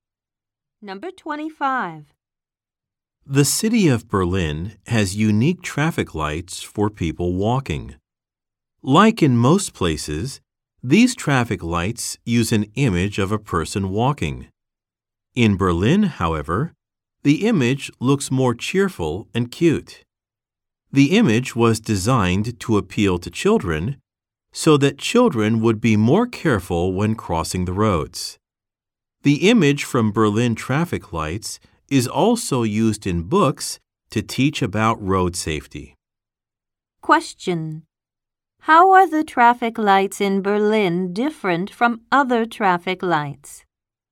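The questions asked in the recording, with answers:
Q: How are the traffic lights in Berlin different from other traffic lights?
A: The walking person image looks cheerful and cute, to appeal to children.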